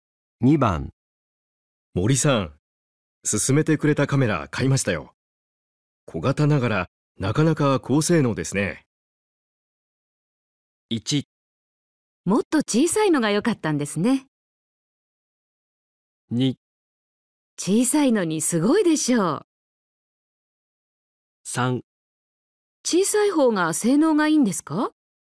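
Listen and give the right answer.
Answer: 2: 小さいのにすごいでしょう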